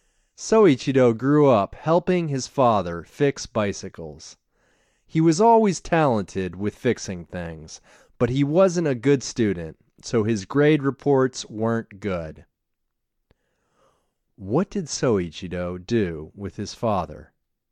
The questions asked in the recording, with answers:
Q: What did Soichiro do with his father?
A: Soichiro helped his father fix bikes.